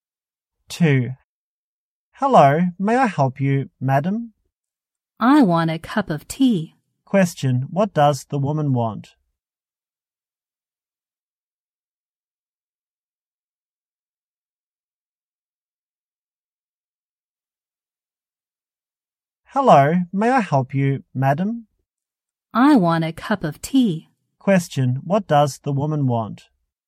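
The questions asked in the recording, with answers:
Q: what does the woman want?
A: A cup of tea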